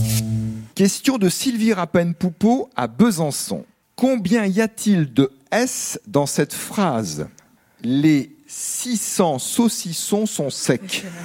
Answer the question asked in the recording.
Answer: il y en a 10. Bravo.